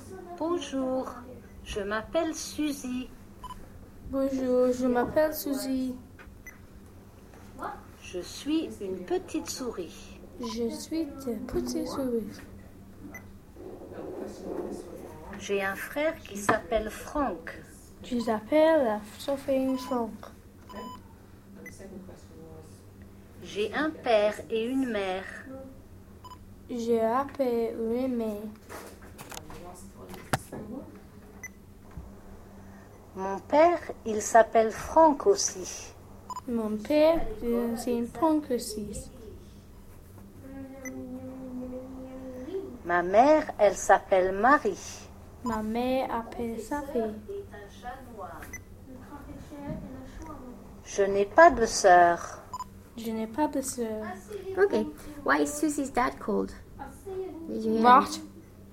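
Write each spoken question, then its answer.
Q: Why is Susie's dad called?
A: Franck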